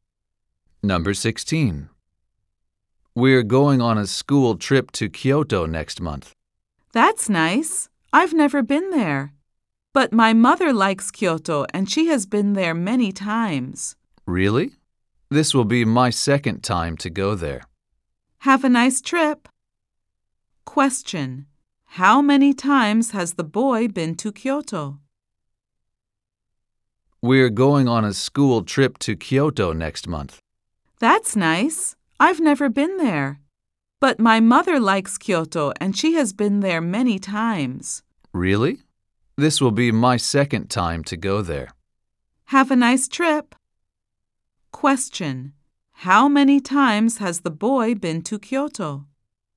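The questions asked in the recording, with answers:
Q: How many times has the boy been to Kyoto?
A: Once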